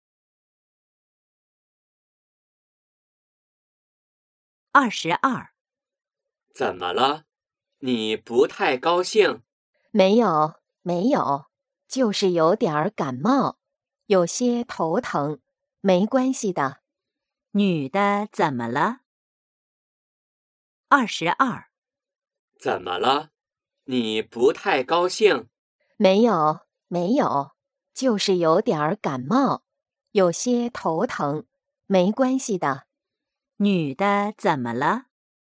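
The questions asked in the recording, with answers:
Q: 女的怎么了?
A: 有点感冒,头疼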